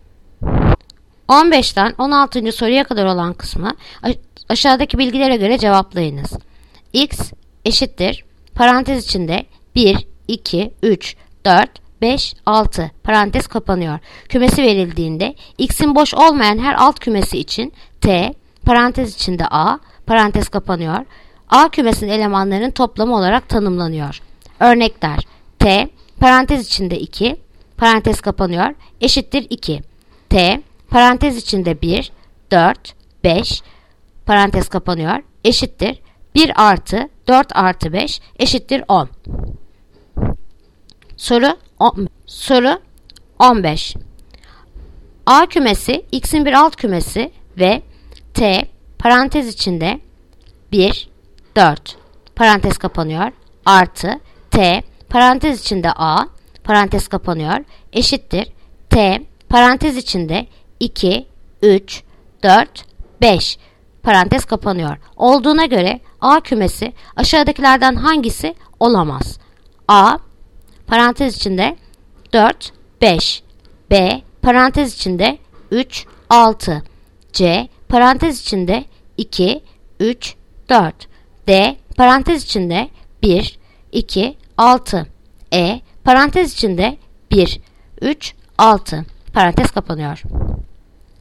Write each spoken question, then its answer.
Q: Olduğuna göre A kümesi aşağıdakilerden hangisi olamaz?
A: Cevap Edirne 1, 3, 6.